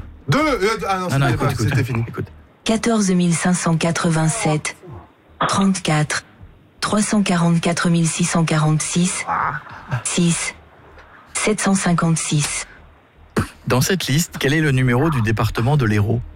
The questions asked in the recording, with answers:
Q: Dans cette liste, quel est le numéro du département de l'Hérault?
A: 34, oui. Voilà, bravo.